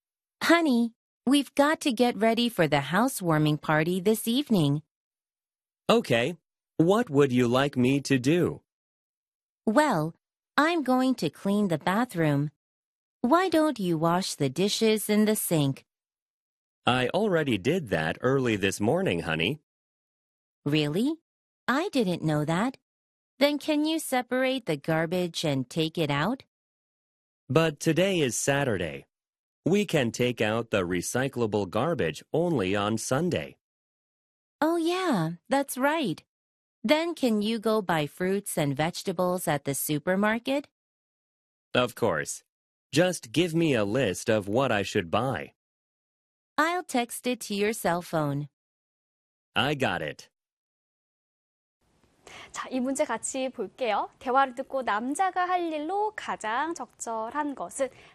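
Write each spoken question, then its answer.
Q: 대화를 듣고 남자가 할 일로 가장 적절한 것은?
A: 슈퍼마켓에 가서 과일과 채소 사기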